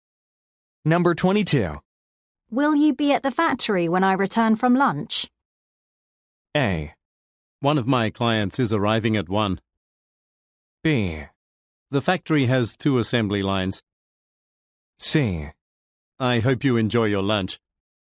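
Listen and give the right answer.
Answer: A: One of my clients is arriving at 1.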